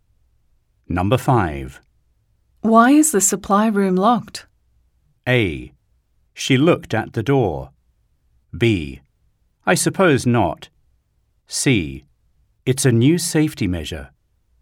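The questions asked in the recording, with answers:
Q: Why is the supply room locked?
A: C: It's a new safety measure.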